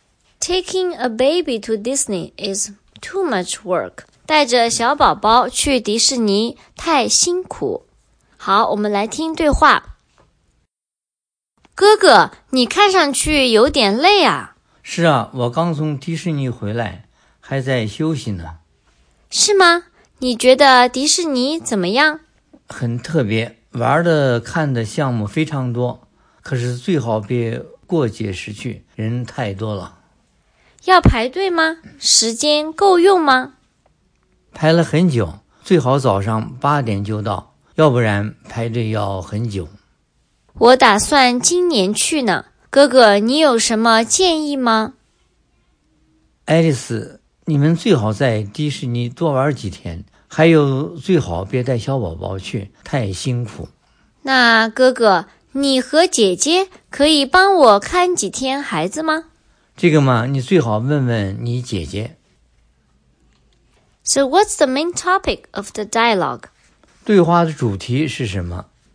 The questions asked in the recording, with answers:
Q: So what's the main topic of the dialogue?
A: It's talking about Alice's brother went to Disney World.